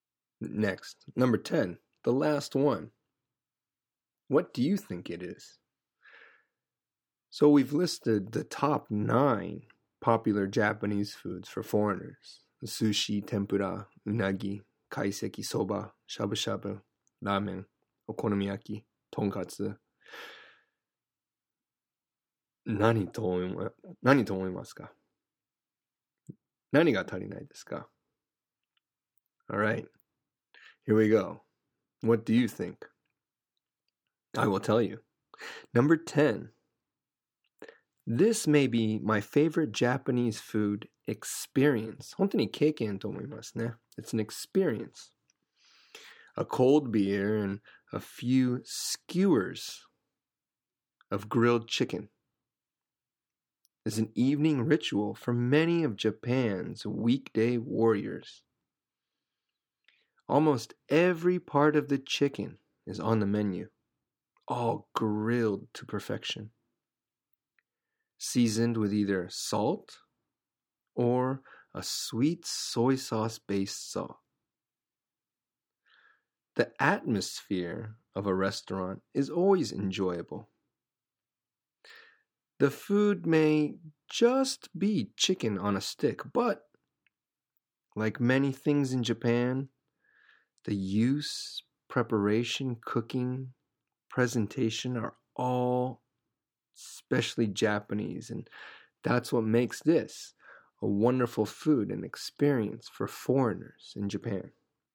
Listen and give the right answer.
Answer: So, 焼き鳥。